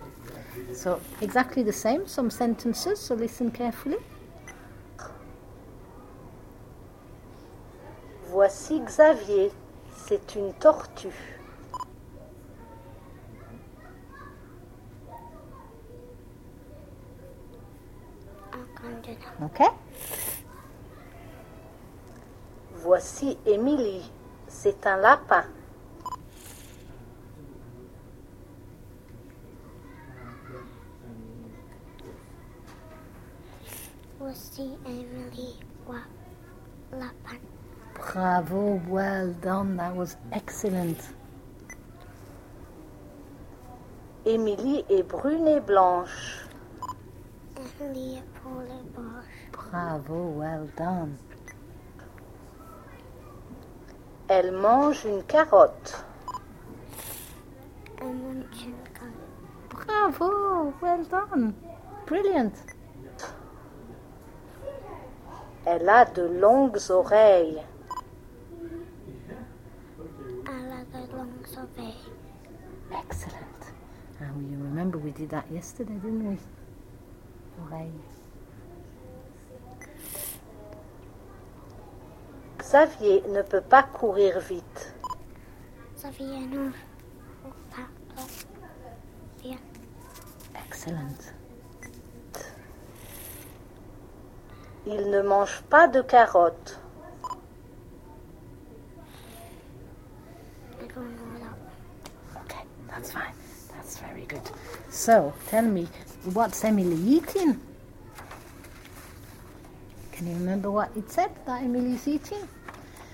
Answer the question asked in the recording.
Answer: Elle mange une carotte.